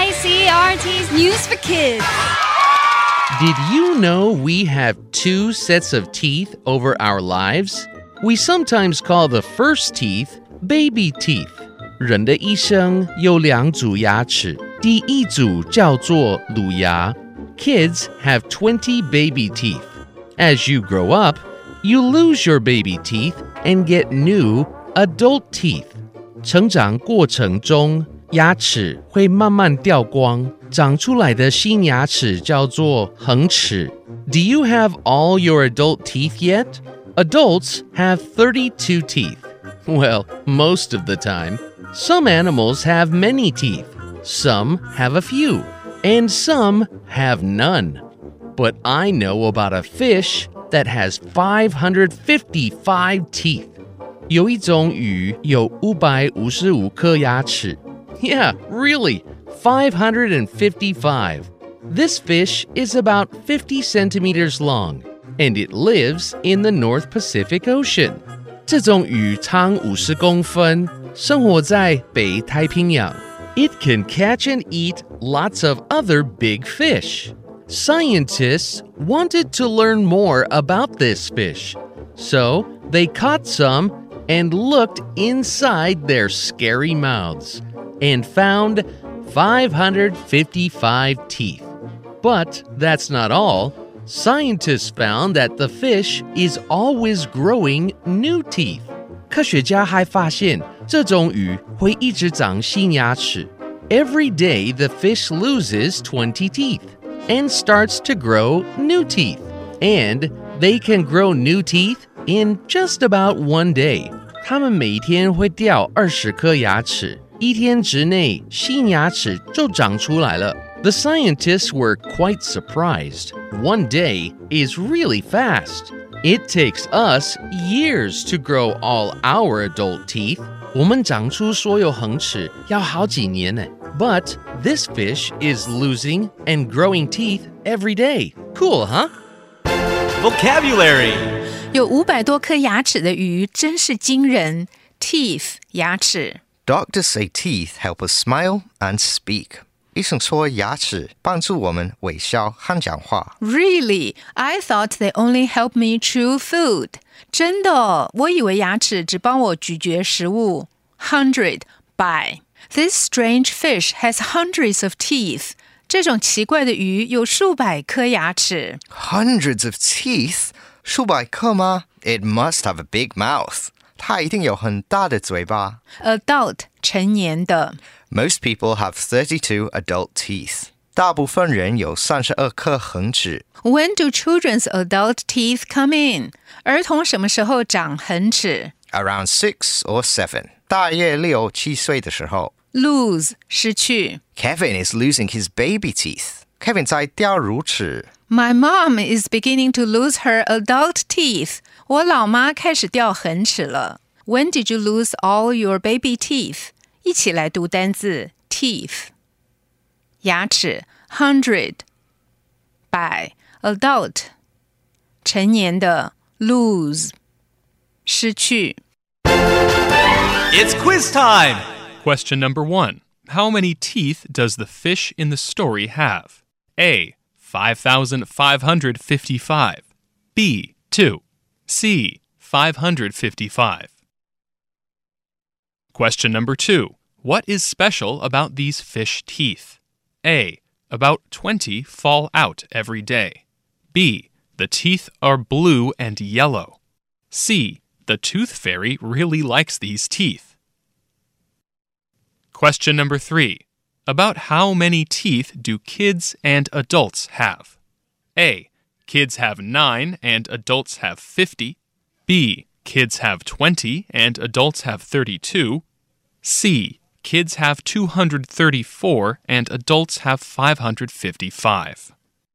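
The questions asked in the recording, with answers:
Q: How many teeth does the fish in the story have?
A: C: 555

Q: What is special about these fish teeth?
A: A: About 20 fall out every day.

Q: About how many teeth do kids and adults have?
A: B: Kids have 20 and adults have 32.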